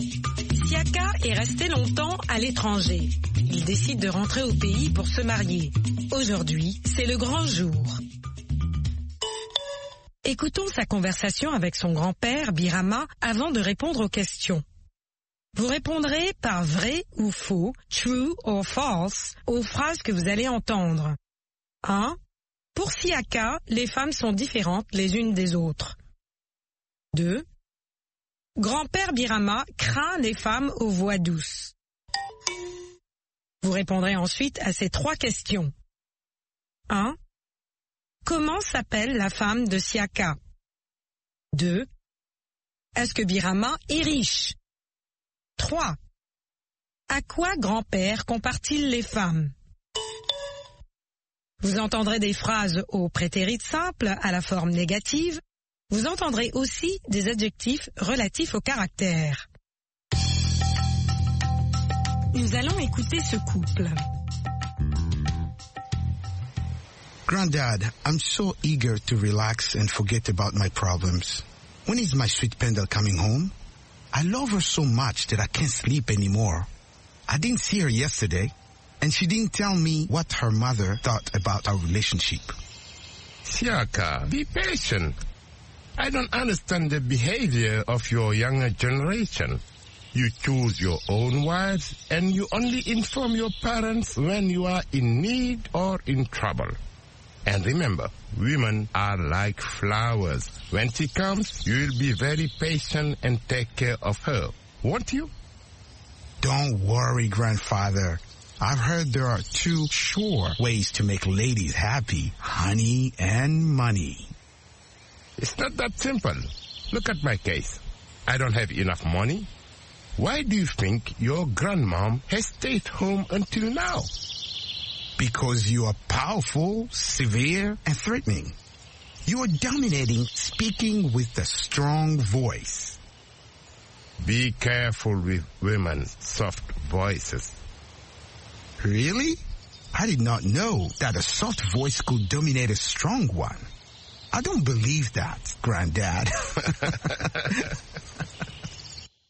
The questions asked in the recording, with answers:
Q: Pour Siaka, les femmes sont différentes les unes des autres.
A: l'énoncé 1 est faux.

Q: Grand-père Birama craint les femmes aux voix douces.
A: L'énoncé 2 est vrai.

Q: Comment s'appelle la femme de Siaka?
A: La femme de Siaka s'appelle Pendel.

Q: Est-ce que Birama est riche?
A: Non, Birama n'est pas riche, mais patient.

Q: À quoi grand-père compare-t-il les femmes?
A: Grand-père compare les femmes aux fleurs.